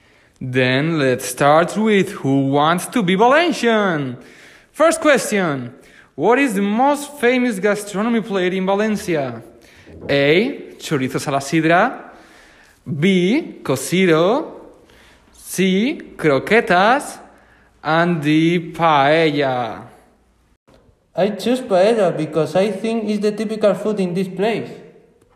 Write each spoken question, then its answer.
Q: What is the most famous gastronomy plate in Valencia?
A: Definitely, I go with paella because this food is known in the rest of Spain